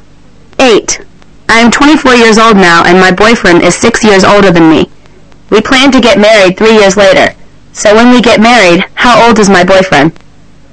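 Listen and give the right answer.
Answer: 33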